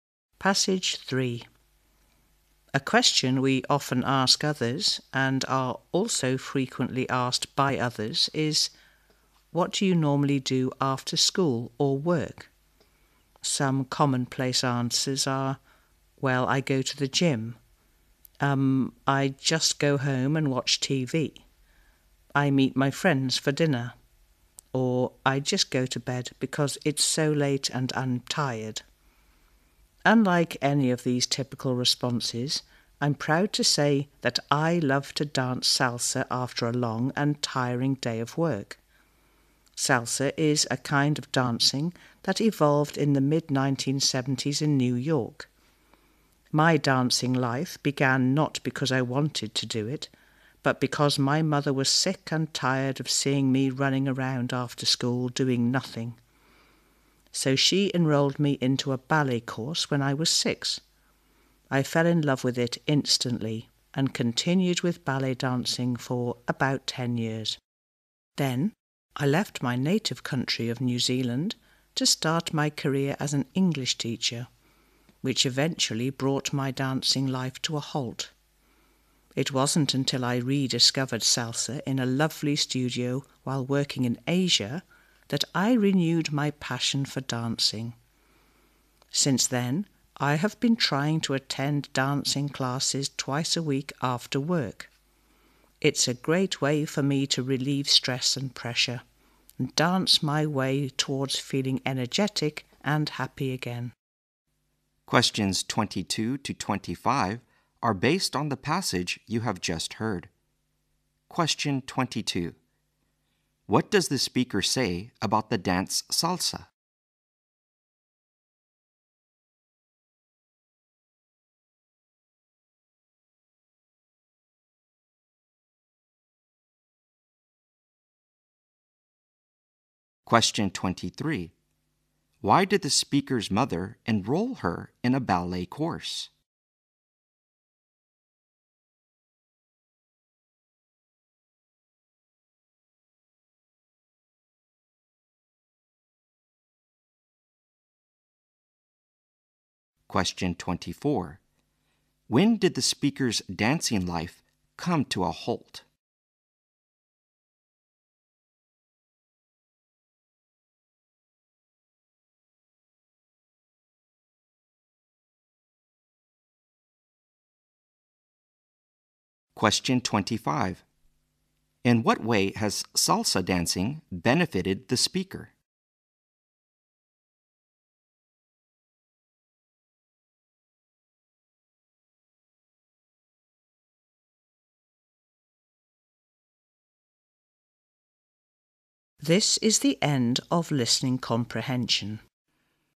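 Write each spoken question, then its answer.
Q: What does the speaker say about the dance salsa?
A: It evolved in the mid-1970s in New York

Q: Why did the speaker's mother enroll her in a ballet course?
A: She was tired of seeing her run around after school doing nothing

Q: When did the speaker's dancing life come to a halt?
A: When she left New Zealand to work as an English teacher

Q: In what way has salsa dancing benefited the speaker?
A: It relieves her stress and makes her energetic and happy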